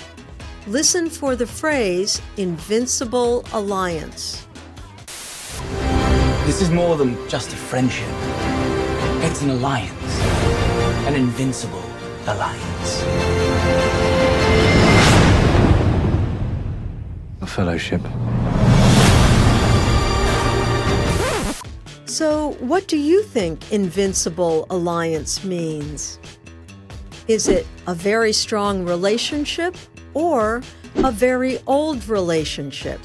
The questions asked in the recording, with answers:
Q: So, what do you think Invincible Alliance means?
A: An invisible alliance means a very strong relationship.